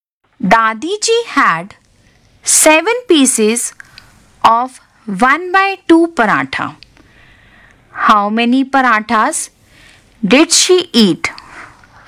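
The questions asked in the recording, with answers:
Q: How many parathas did she eat?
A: 3 1/2 parathas (7/2)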